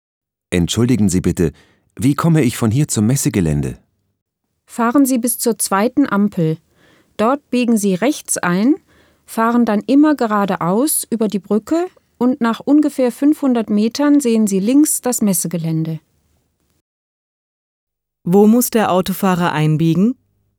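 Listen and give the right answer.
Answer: An der zweiten Ampel rechts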